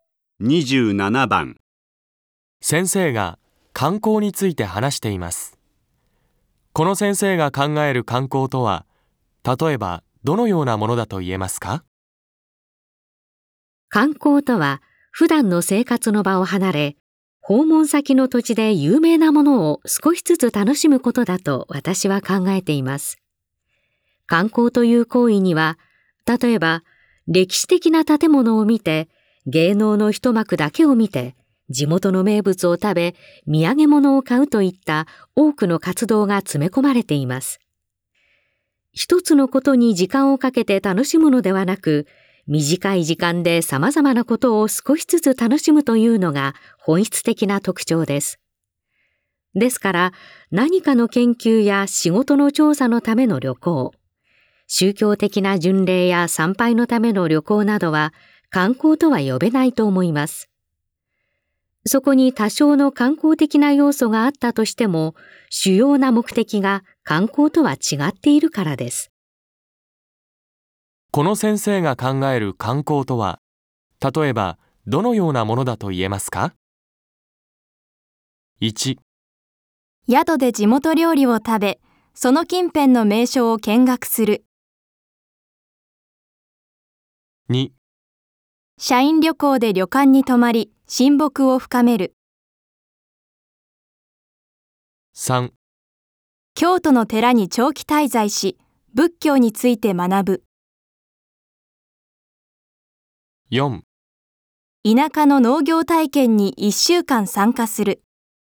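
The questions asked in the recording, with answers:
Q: この先生が考える観光とは、例えばどのようなものだと言えますか?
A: 1: 宿で地元料理を食べ、その近辺の名所を見学する。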